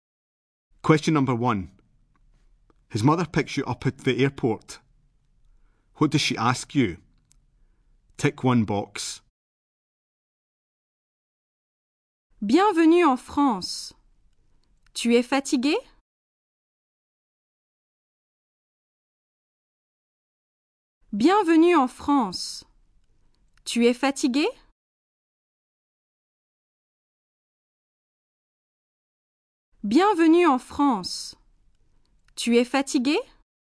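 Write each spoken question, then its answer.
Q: What does she ask you?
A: If you are tired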